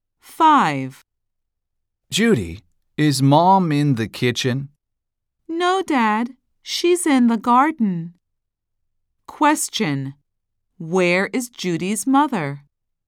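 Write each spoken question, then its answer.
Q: Where is Judy's mother?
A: In the garden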